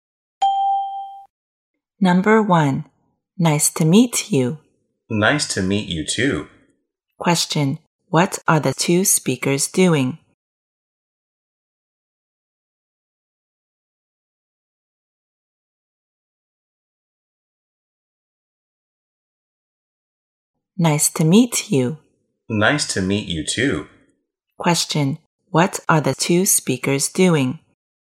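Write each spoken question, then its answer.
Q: what are the two speakers doing?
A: Greeting each other when meeting for the first time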